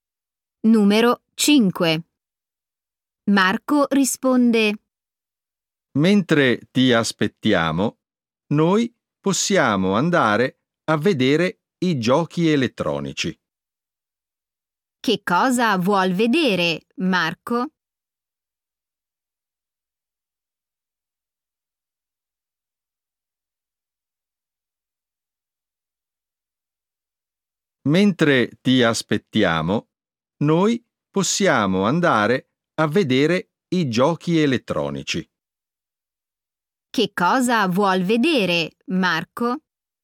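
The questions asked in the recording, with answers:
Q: Che cosa vuol vedere, Marco?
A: i giochi elettronici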